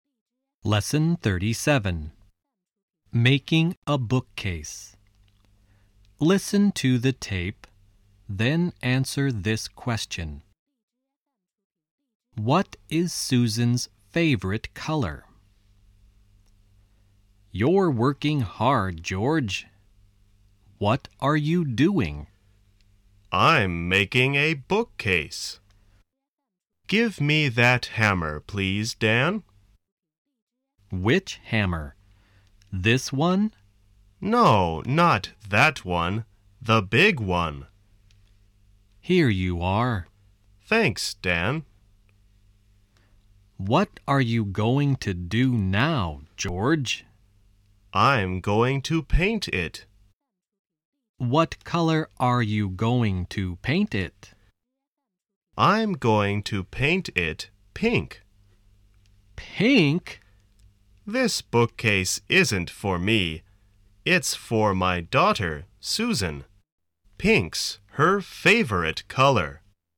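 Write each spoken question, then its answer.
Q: What is Susan's favorite color?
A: Pink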